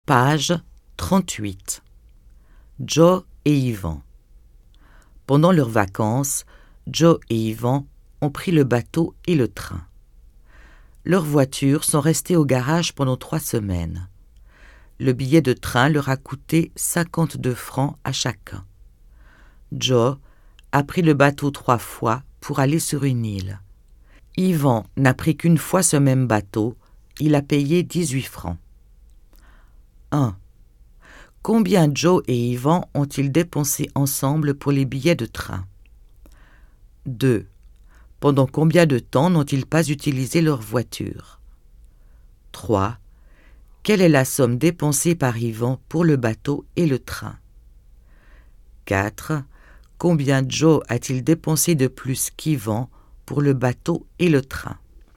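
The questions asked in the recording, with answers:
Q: Combien Joe et Yvan ont-ils dépensé ensemble pour les billets de train?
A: 104 francs

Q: Pendant combien de temps n'ont-ils pas utilisé leur voiture?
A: 3 semaines

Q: Quelle est la somme dépensée par Yvan pour le bateau et le train?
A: 70 francs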